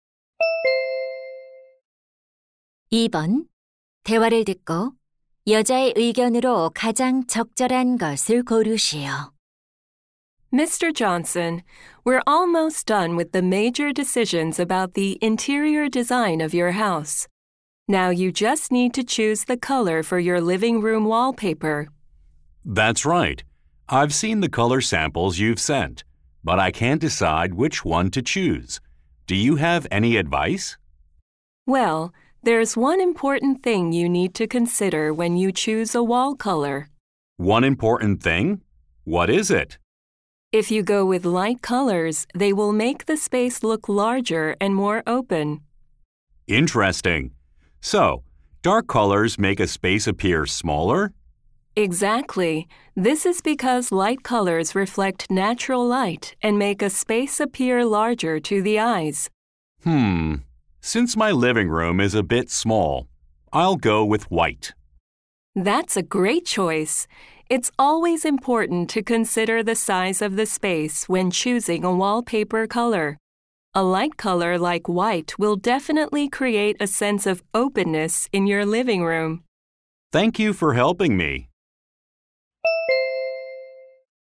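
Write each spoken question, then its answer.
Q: 대화를 듣고 여자의 의견으로 가장 적절한 것을 고르시오.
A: 벽지 색을 고를 때 공간의 크기를 고려해야 한다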